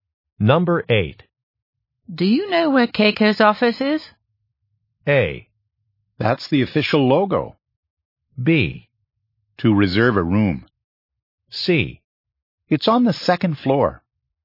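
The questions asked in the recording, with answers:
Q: Do you know where Keiko's office is?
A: C: It's on the second floor.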